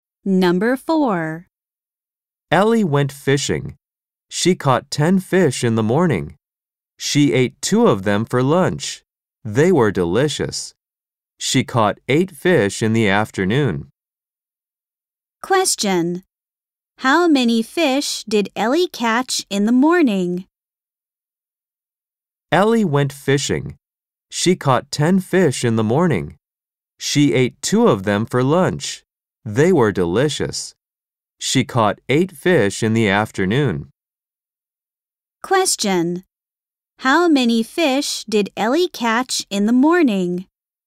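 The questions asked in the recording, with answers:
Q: How many fish did Ellie catch in the morning?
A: 10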